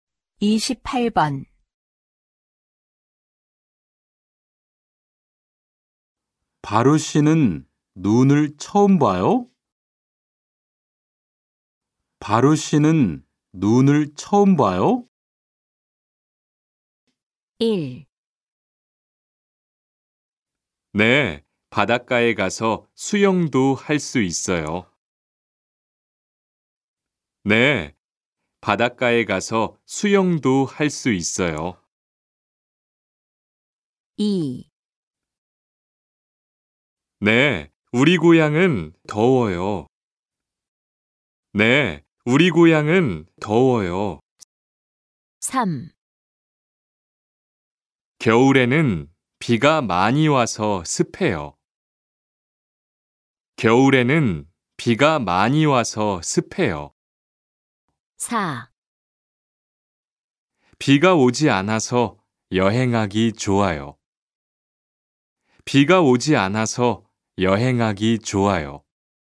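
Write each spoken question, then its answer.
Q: 바로 씨는 눈을 처음 봐요?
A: 2: 네, 우리 고향은 더워요.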